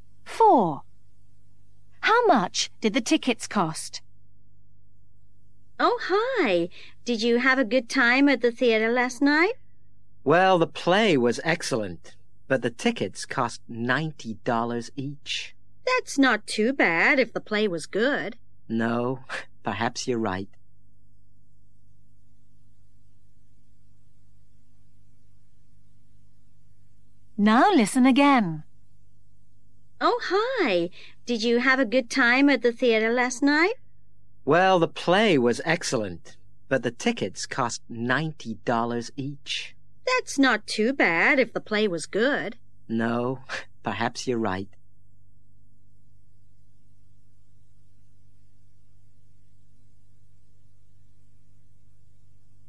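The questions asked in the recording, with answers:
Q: How much did the tickets cost?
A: $90 each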